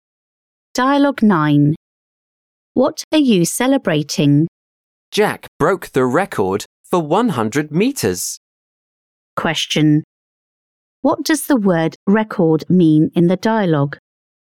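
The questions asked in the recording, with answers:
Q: What does the word record mean in the dialogue?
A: the best performance ever achieved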